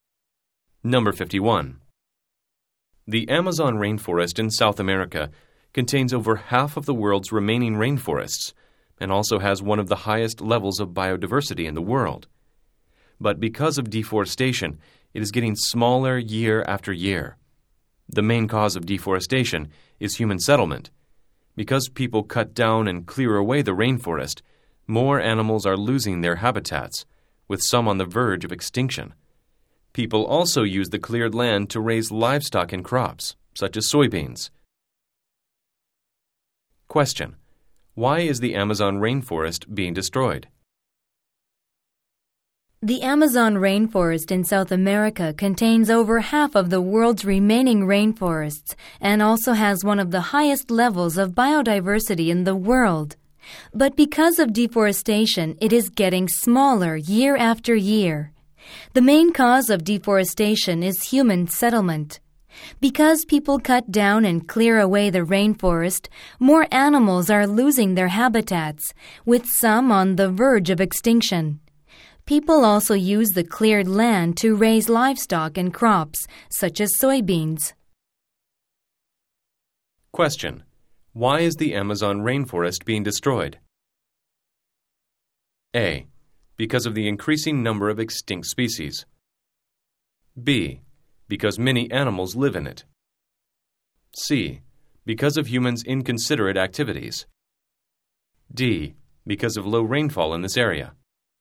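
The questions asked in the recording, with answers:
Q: Why is the Amazon rainforest being destroyed?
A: C: Because of humans' inconsiderate activities.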